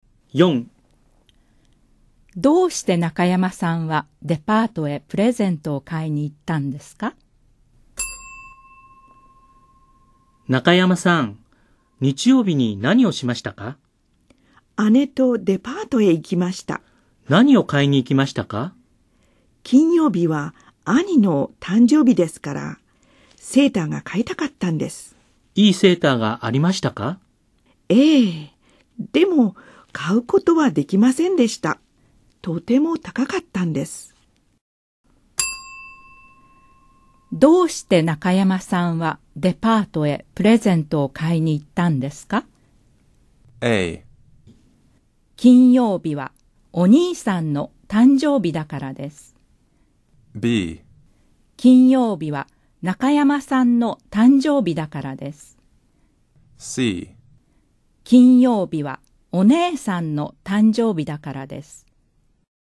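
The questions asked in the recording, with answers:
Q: どうして中山さんはデパートへプレゼントを買いに行ったんですか?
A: A: 金曜日はお兄さんの誕生日だからです。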